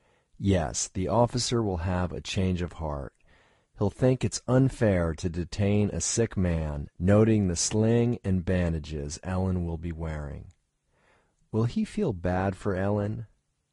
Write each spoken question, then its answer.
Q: Will he feel bad for Ellen?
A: Yes, he will feel bad for Ellen.